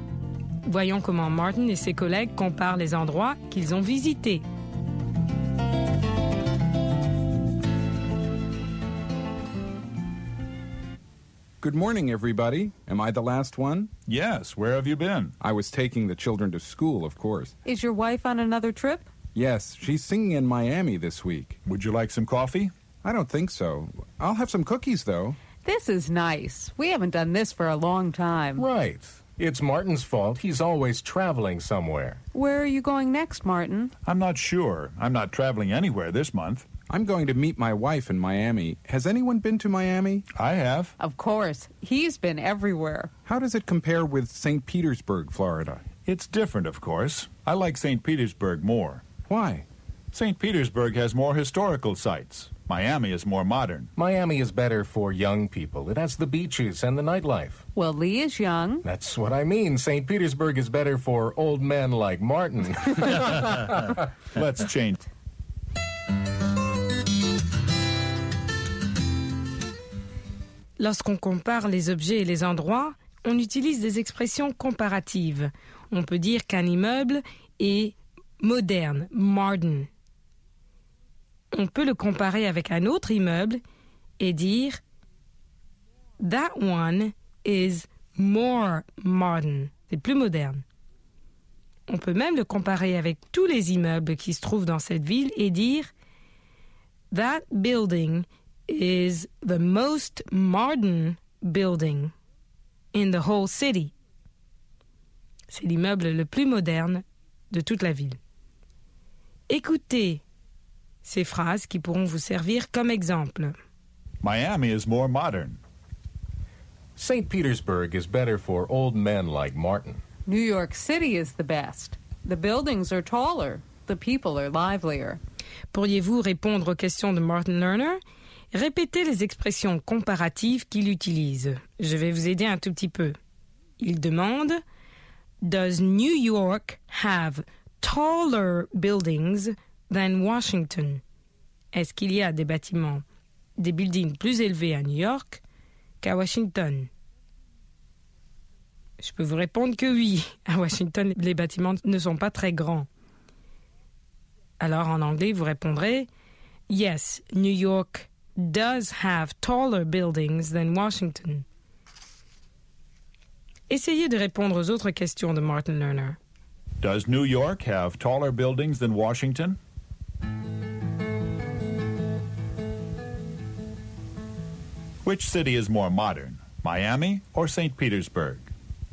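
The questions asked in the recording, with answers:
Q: Which city is more modern, Miami or St. Petersburg?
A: Miami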